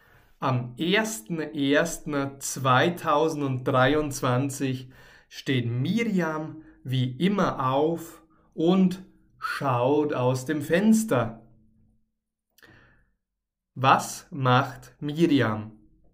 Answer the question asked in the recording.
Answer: Sie steht wie immer auf und sie schaut aus dem Fenster.